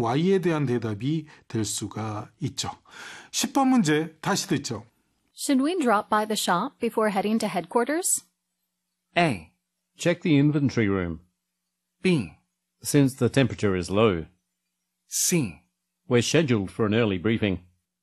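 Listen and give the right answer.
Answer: C: we're scheduled for an early briefing.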